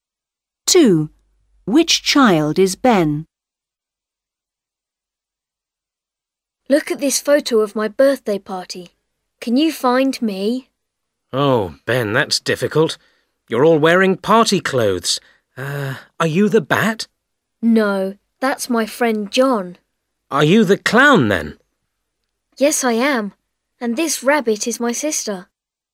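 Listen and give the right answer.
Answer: The clown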